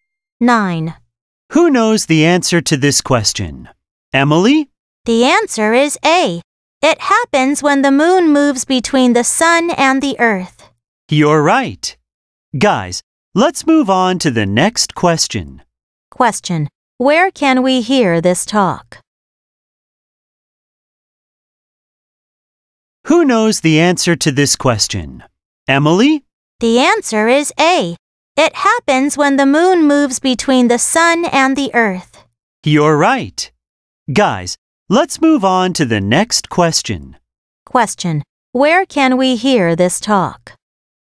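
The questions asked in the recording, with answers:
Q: where can we hear this talk?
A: In a classroom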